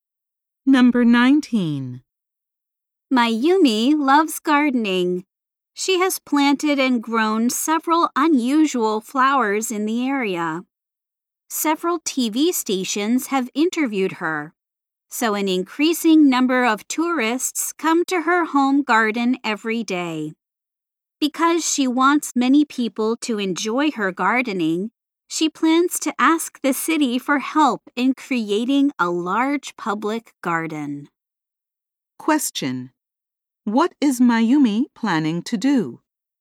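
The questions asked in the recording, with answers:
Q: What is Mayumi planning to do?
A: Ask the city for help in creating a large public garden.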